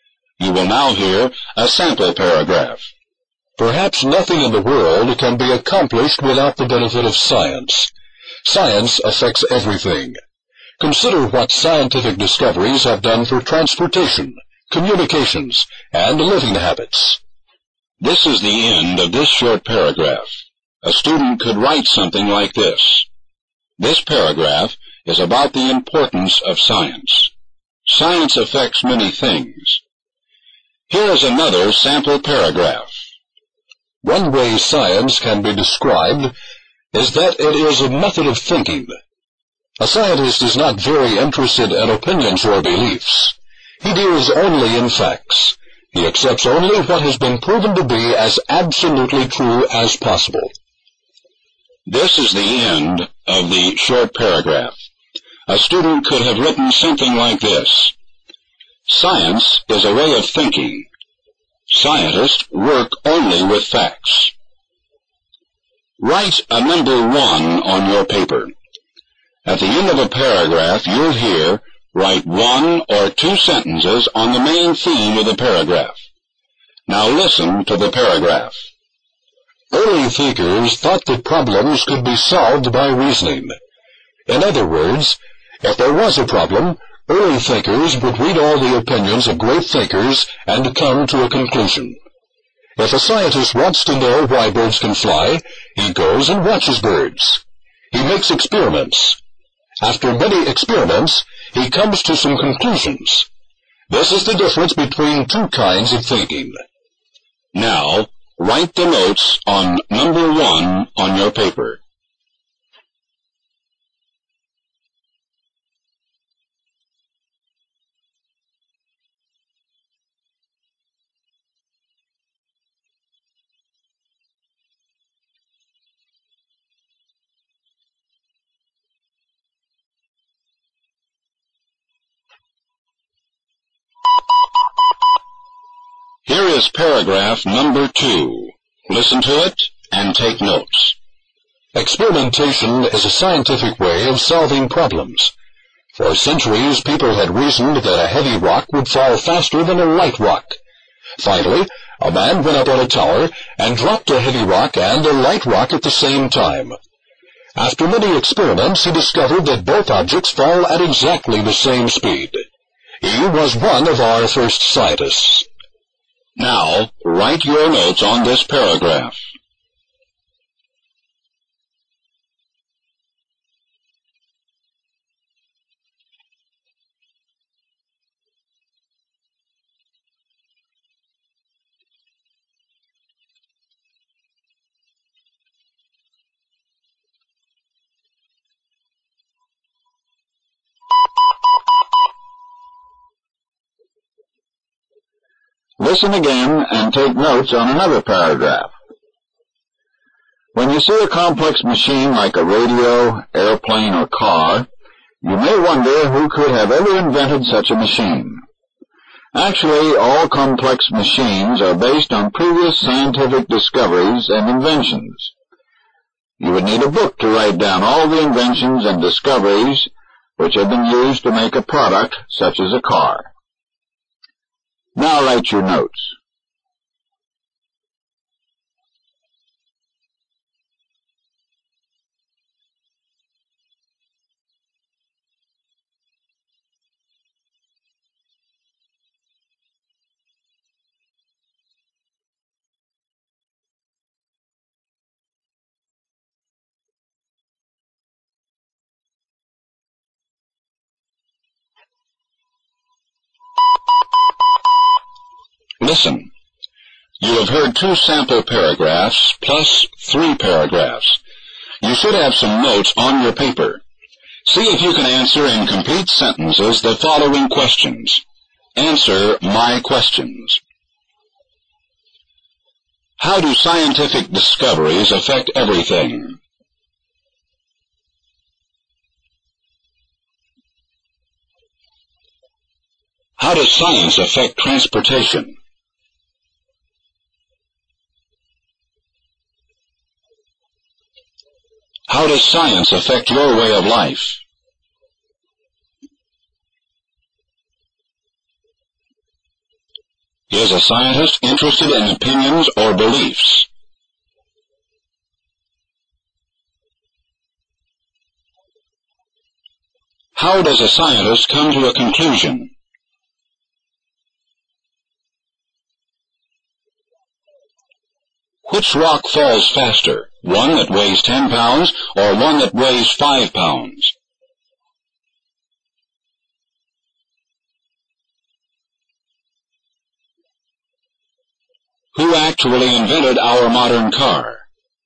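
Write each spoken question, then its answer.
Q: Is a scientist interested in opinions or beliefs?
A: No, a scientist deals only in facts.

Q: How does a scientist come to a conclusion?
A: By observing and making many experiments.

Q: Which rock falls faster? One that weighs 10 pounds or one that weighs 5 pounds?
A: Neither; both fall at exactly the same speed.

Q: Who actually invented our modern car?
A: No single person; it is based on many previous scientific discoveries and inventions.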